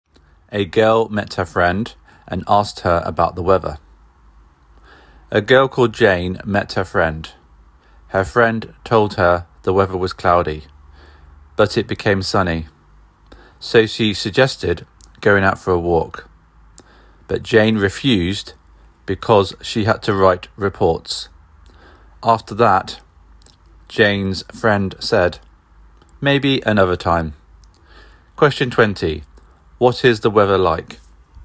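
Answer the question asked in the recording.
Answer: It is sunny.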